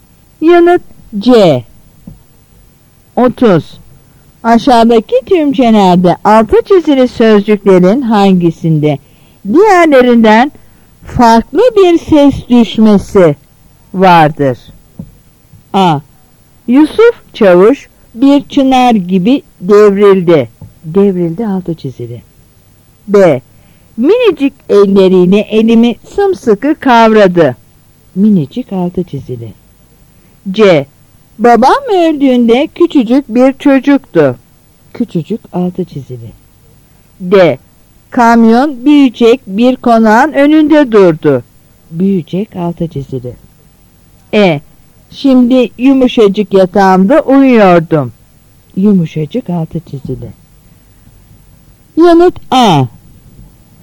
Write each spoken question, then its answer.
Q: Aşağıdaki tümcelerde altı çizili sözcüklerin hangisinde diğerlerinden farklı bir ses düşmesi vardır?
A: Yanıt A.